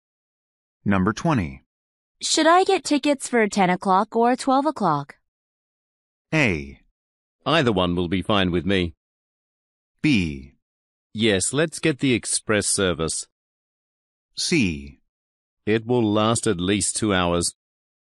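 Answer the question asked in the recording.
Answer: A: Either one will be fine with me.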